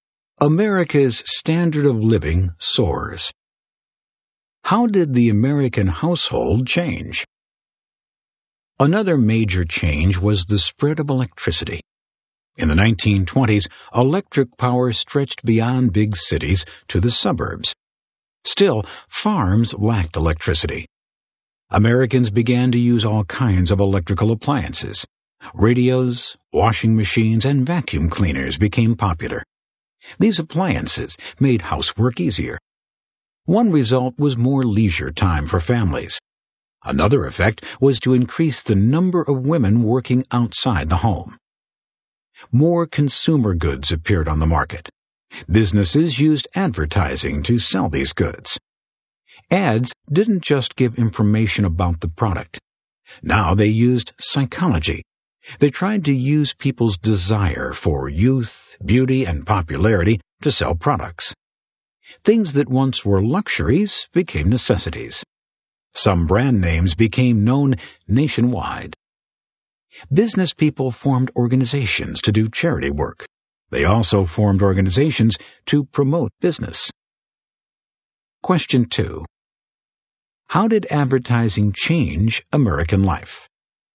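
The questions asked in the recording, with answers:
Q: How did advertising change American life?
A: It used psychology (desire for youth, beauty, popularity) to sell goods, turning luxuries into necessities and making brand names known nationwide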